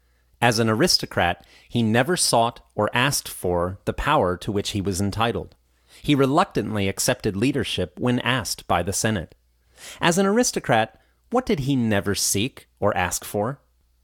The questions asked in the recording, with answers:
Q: As an aristocrat, what did he never seek or ask for?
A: As an aristocrat, he never sought or asked for the power to which he was entitled.